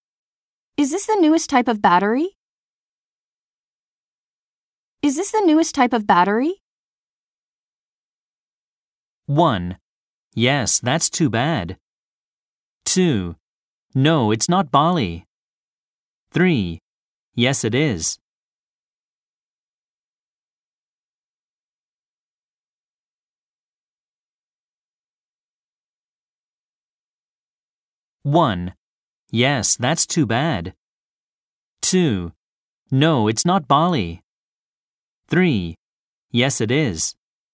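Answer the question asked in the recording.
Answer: 3: Yes, it is.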